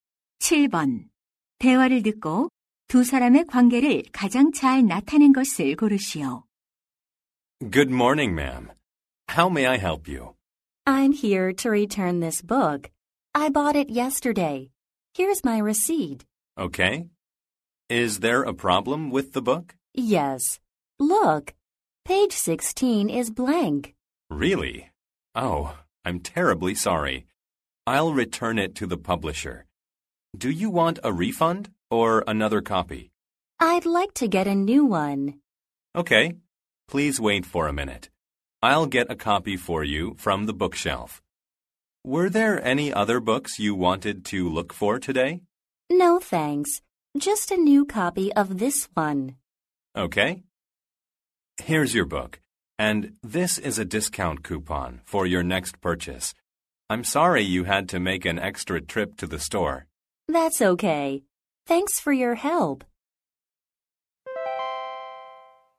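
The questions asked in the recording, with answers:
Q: 대화를 듣고 두 사람의 관계를 가장 잘 나타낸 것을 고르시오.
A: 서점 직원과 손님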